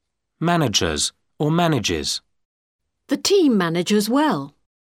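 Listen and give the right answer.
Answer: manages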